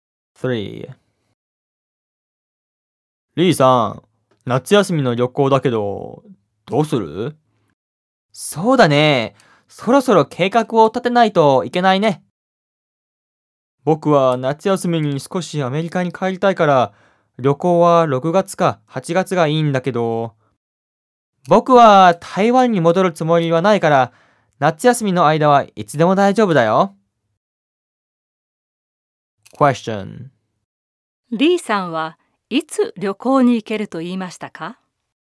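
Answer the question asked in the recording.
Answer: 夏休みの間はいつでも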